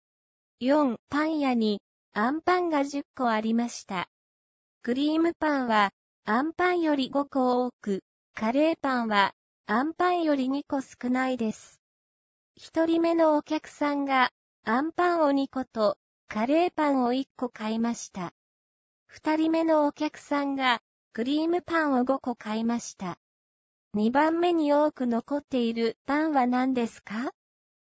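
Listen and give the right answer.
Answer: あんパン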